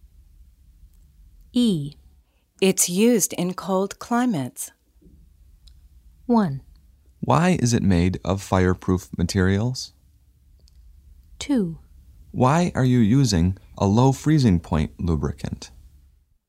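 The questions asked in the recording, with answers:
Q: It's used in cold climates.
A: 2: Why are you using a low freezing point lubricant?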